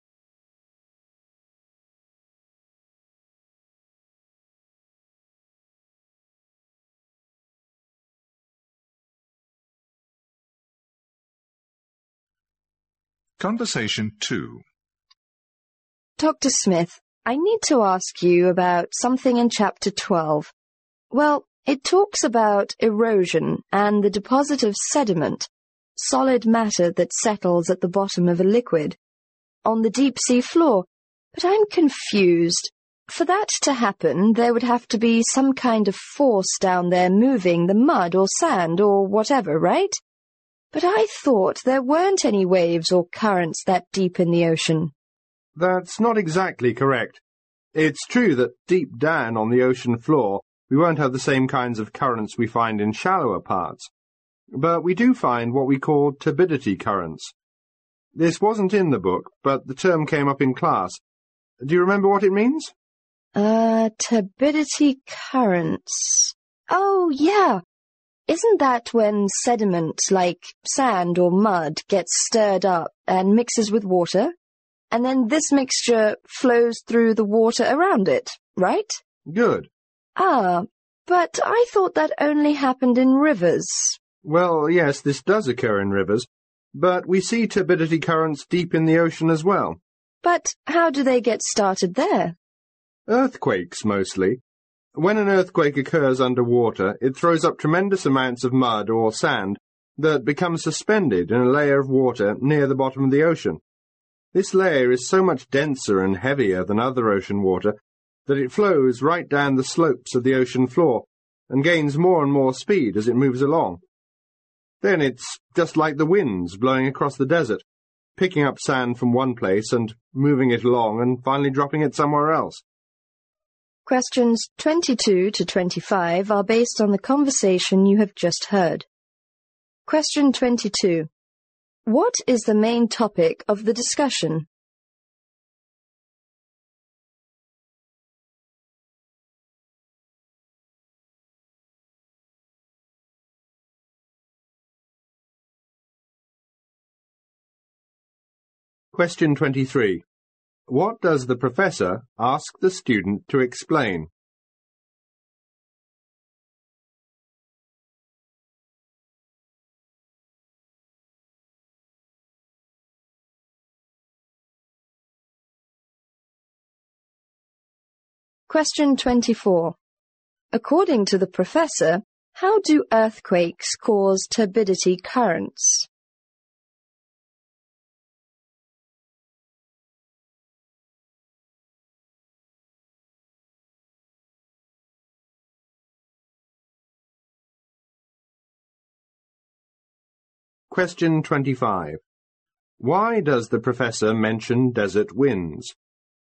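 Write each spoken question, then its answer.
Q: What is the main topic of the discussion?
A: Turbidity currents on the deep ocean floor

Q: What does the professor ask the student to explain?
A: What turbidity currents are

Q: According to the professor, how do earthquakes cause turbidity currents?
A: They throw up mud or sand that becomes suspended in a dense layer of water that flows down the ocean floor slopes.

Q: Why does the professor mention desert winds?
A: To compare how sediment is picked up, moved and dropped elsewhere.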